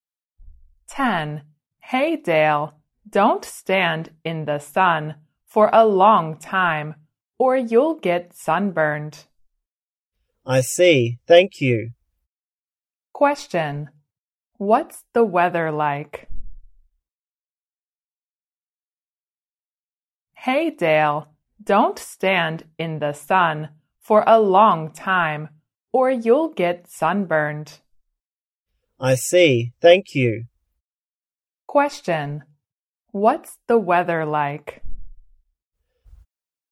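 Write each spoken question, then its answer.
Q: what's the weather like?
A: Sunny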